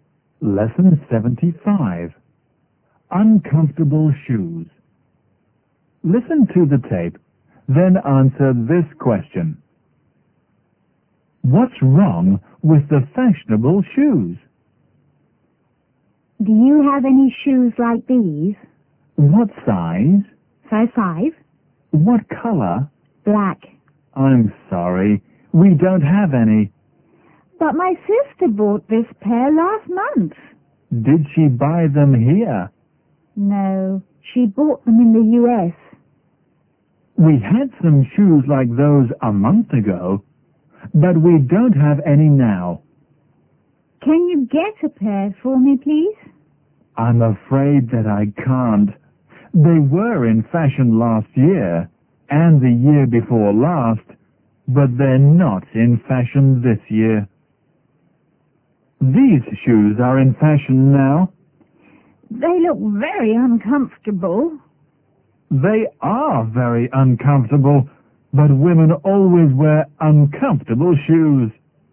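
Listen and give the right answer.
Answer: They are very uncomfortable.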